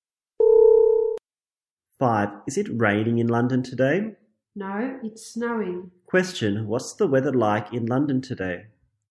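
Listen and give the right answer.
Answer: It's snowing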